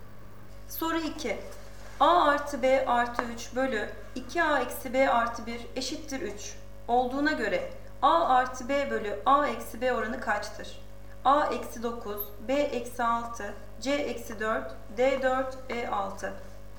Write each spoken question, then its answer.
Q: Olduğuna göre A artı B bölü A eksi B oranı kaçtır?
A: Doğru cevap A eksi 9.